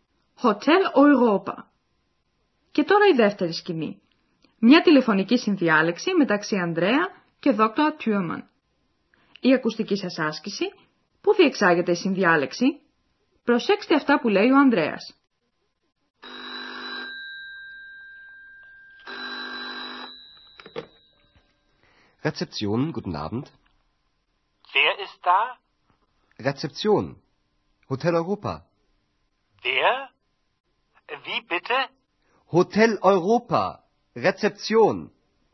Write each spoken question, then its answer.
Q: Πού διεξάγεται η συνδιάλεξη?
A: Στη reception, Rezeption, σηκώνει το τηλέφωνο ο Ανδρέας.